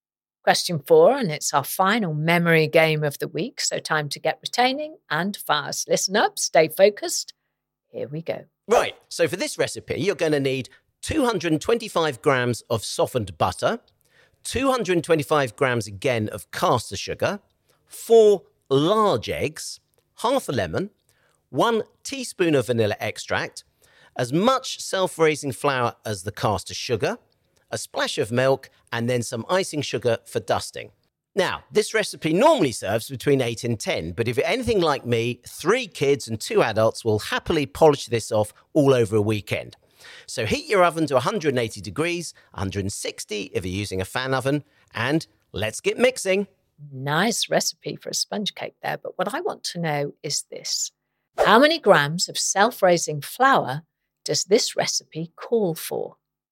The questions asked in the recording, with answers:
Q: How many grams of self-raising flour does this recipe call for?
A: And the answer I was looking for was 225 grams, the same as butter and caster sugar in the recipe.